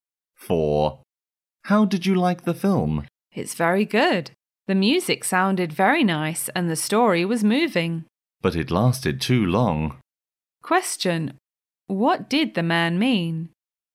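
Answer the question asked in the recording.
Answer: The film was good but too long.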